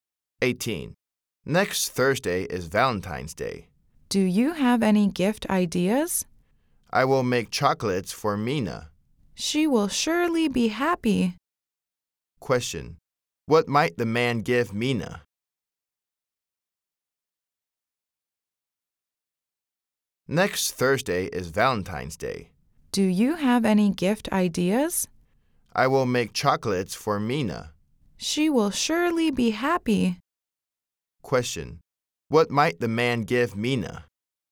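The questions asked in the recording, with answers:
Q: Question: What might the man give Mina?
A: Chocolates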